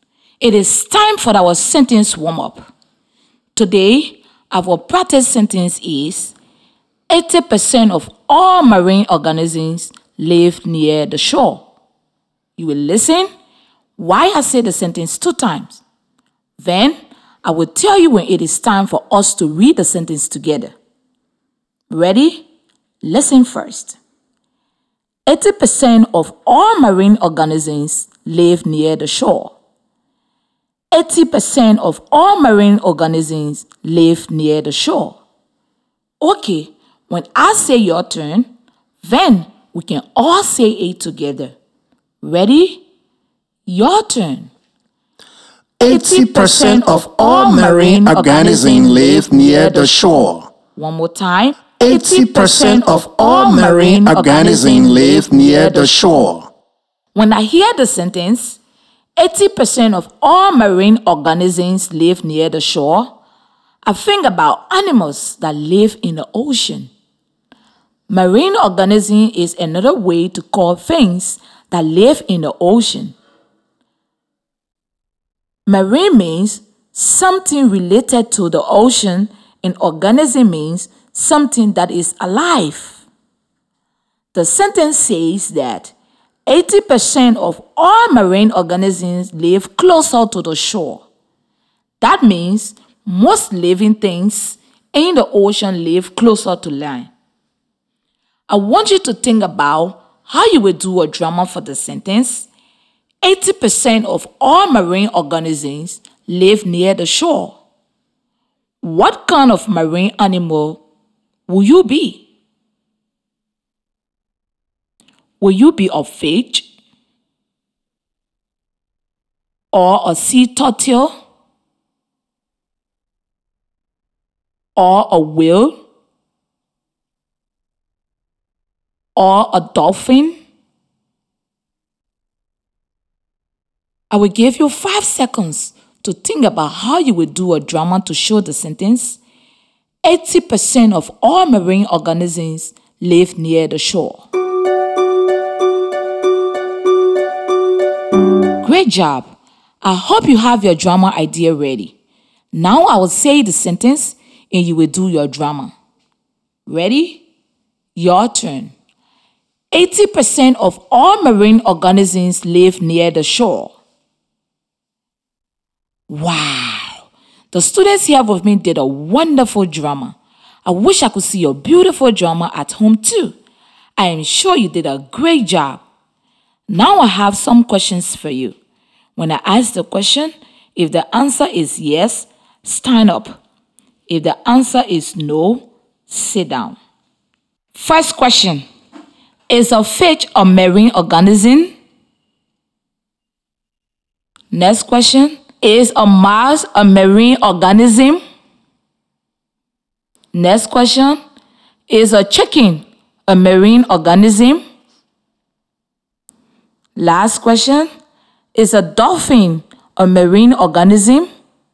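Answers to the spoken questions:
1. Yes
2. No
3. No
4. Yes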